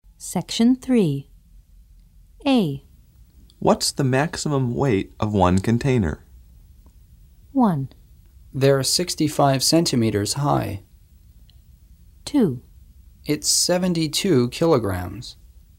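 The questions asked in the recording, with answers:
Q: What's the maximum weight of one container?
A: 2: It's 72 kilograms.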